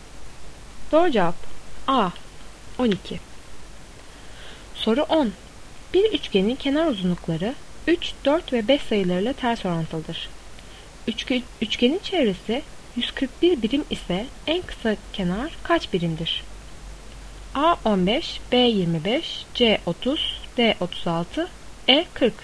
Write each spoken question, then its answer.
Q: Üçgenin çevresi 141 birim ise en kısa kenar kaç birimdir?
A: Doğru cevap D 36.